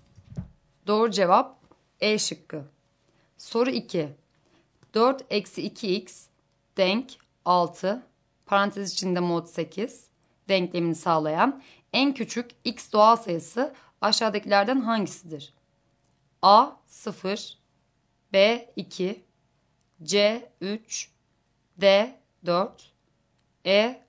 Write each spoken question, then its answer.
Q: 4-2x denk 6, parantez içinde mod 8 denklemini sağlayan en küçük x doğal sayısı aşağıdakilerden hangisidir?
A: Doğru cevap C şıkkı.